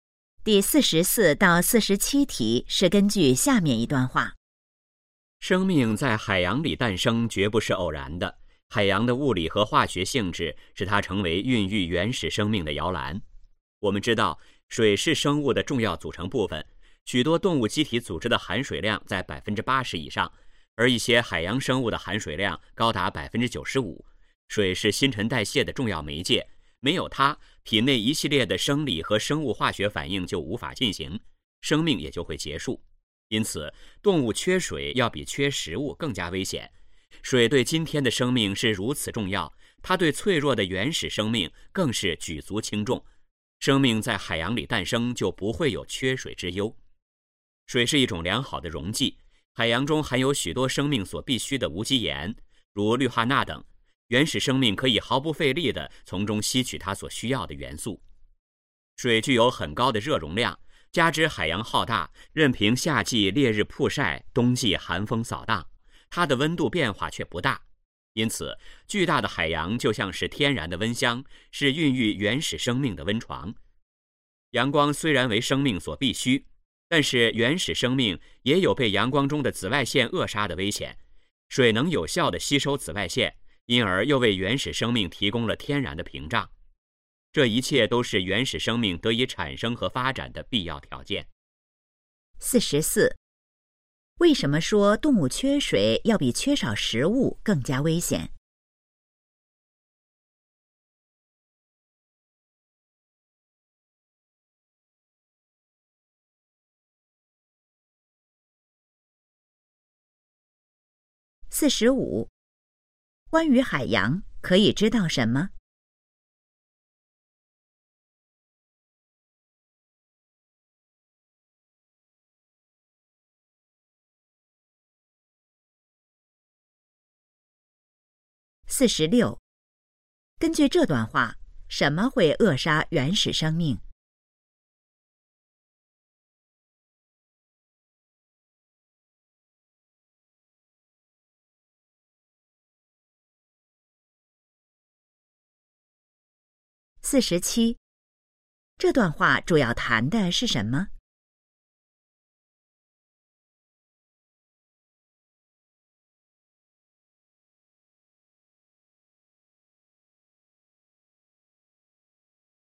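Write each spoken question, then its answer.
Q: 为什么说动物缺水要比缺少食物更加危险?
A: 水是新陈代谢的重要媒介,没有水生命就会结束

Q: 根据这段话,什么会扼杀原始生命?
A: 阳光中的紫外线

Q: 这段话主要谈的是什么?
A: 生命为什么诞生在海洋里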